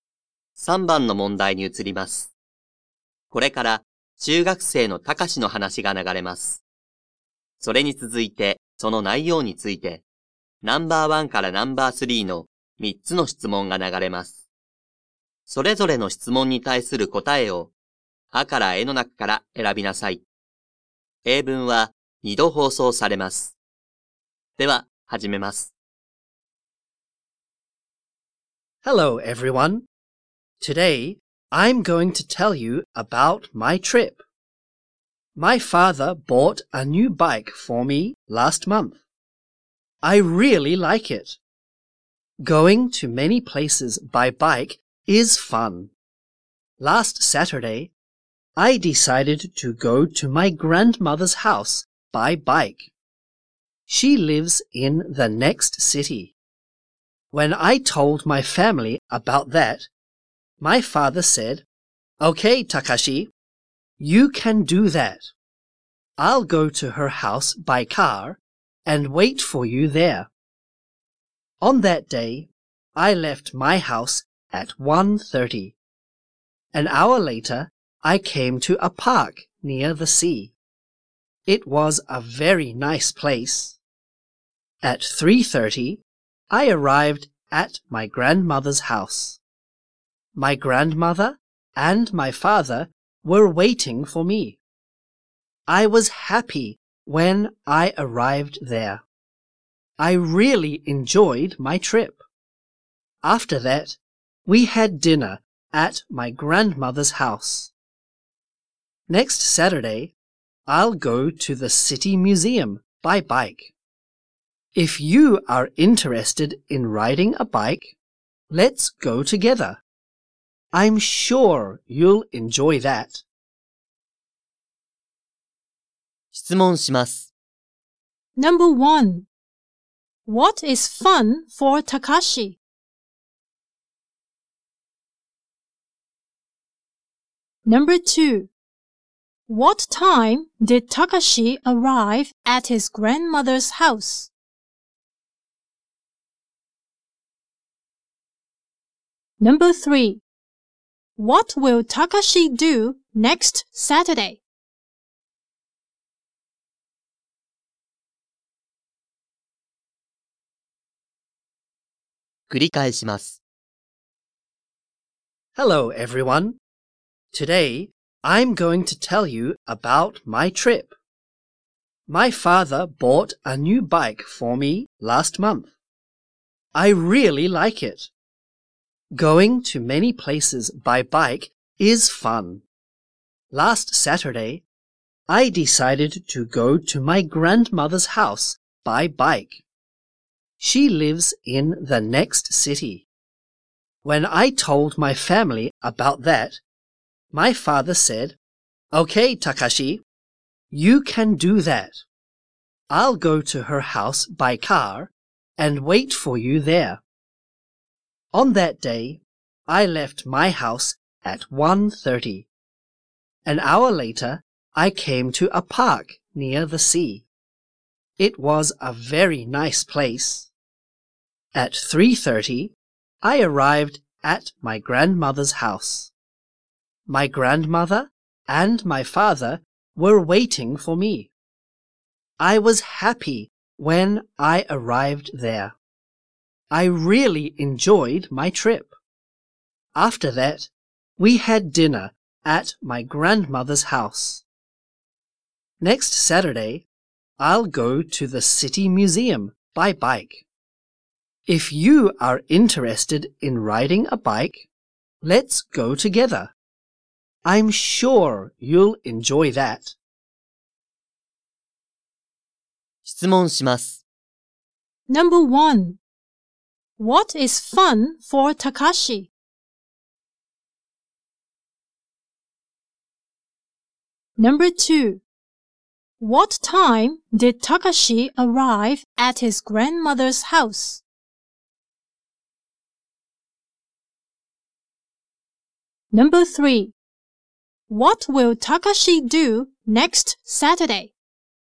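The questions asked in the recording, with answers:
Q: What is fun for Takashi?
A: Going to many places by bike

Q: What time did Takashi arrive at his grandmother's house?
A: At 3:30

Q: What will Takashi do next Saturday?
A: He will go to the City Museum by bike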